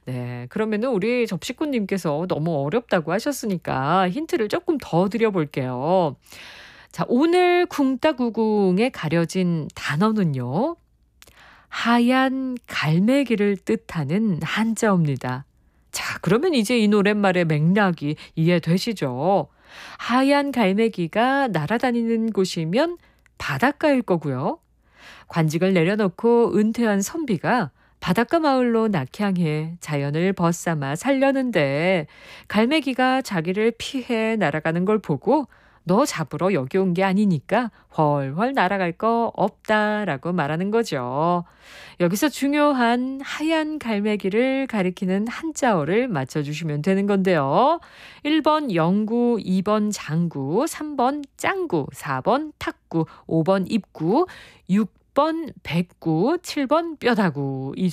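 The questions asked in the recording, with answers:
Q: 여기서 중요한 하얀 갈매기를 가리키는 한자어를 맞춰주시면 되는 건데요.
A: 6: 백구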